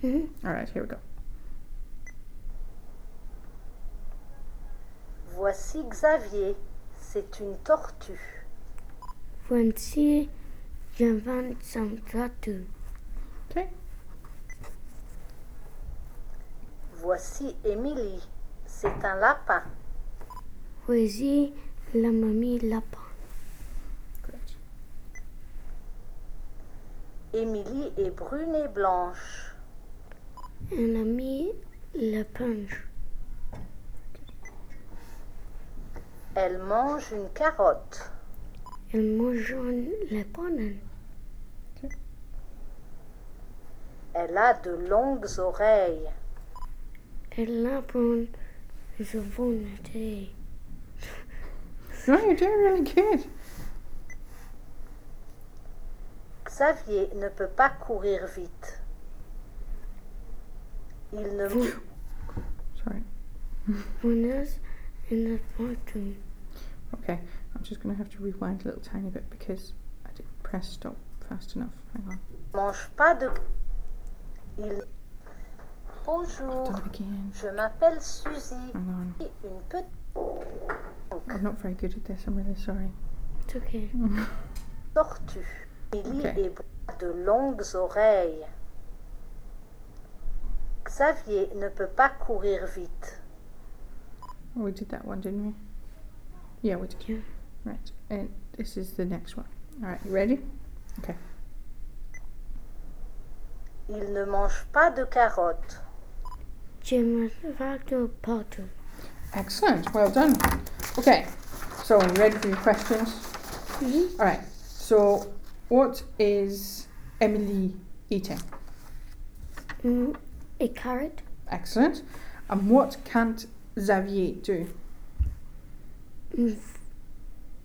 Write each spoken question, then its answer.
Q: So, what is Emily eating?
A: A carrot.

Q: And what can't Xavier do?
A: Run.